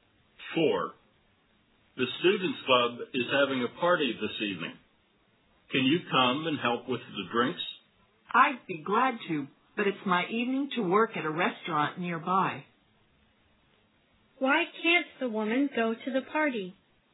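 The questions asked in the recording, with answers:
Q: Why can't the woman go to the party?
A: She has to work at a restaurant nearby that evening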